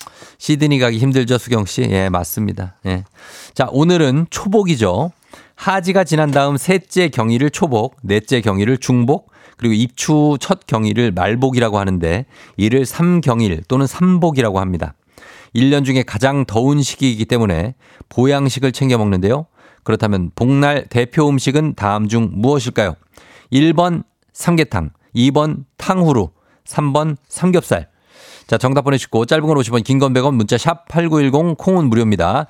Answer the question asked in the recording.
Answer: 정답은 바로 삼계탕이죠.